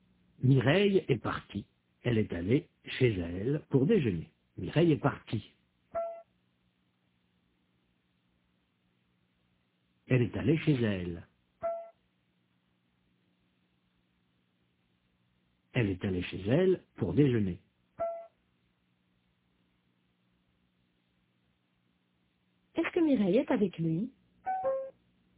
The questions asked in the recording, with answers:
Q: Est-ce que Mireille est avec lui ?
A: Non, il est seul. Mireille est partie.